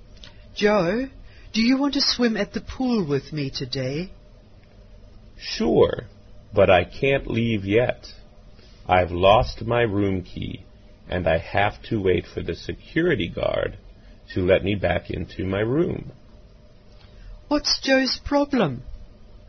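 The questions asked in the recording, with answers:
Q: What's Joe's problem?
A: He lost his room key.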